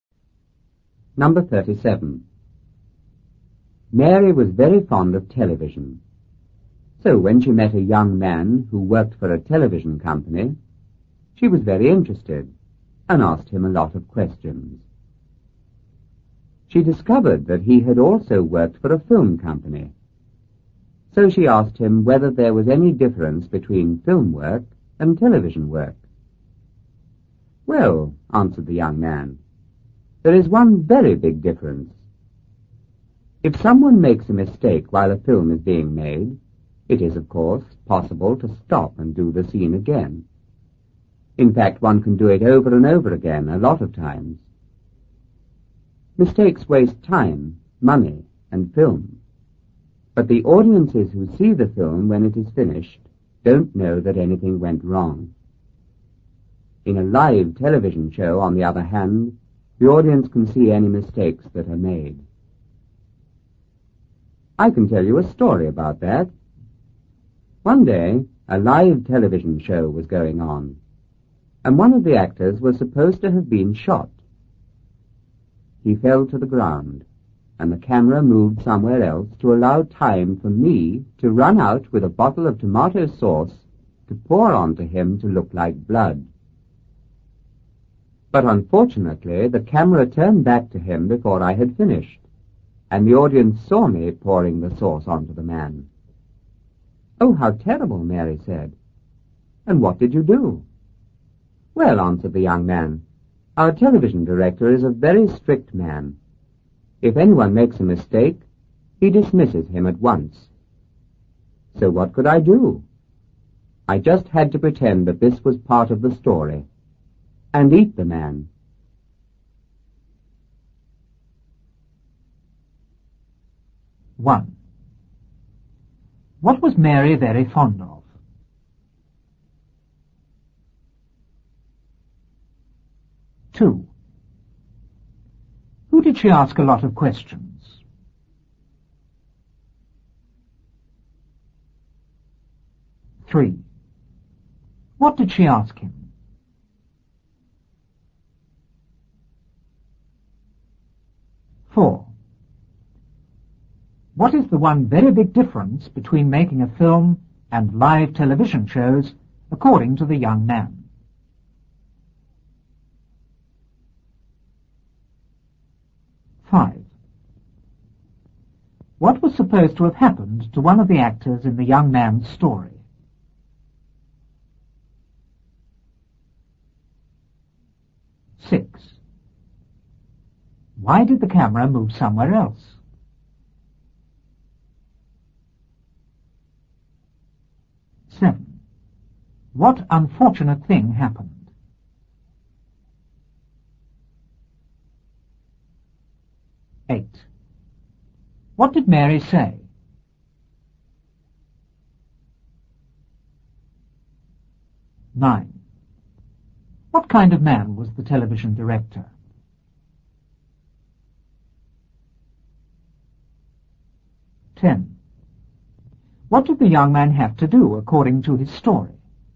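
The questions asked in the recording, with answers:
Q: What was Mary very fond of?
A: Television

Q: Who did she ask a lot of questions?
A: A young man who worked for a television company

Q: What did she ask him?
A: Whether there was any difference between film work and television work

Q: What is the one very big difference between making a film and live television shows, according to the young man?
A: In a film mistakes can be redone unseen; in live TV the audience sees mistakes

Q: What was supposed to have happened to one of the actors in the young man's story?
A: He was supposed to have been shot

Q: Why did the camera move somewhere else?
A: To allow time for the young man to pour tomato sauce on him to look like blood

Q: What unfortunate thing happened?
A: The camera turned back before he finished and the audience saw him pouring the sauce

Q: What did Mary say?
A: Oh, how terrible. 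And what did you do?

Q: What kind of man was the television director?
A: A very strict man

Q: What did the young man have to do according to his story?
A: Pretend it was part of the story and eat the man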